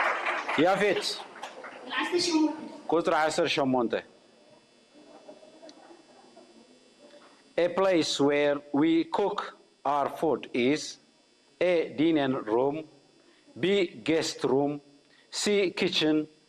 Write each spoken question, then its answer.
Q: A place where we cook our food is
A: C, kitchen.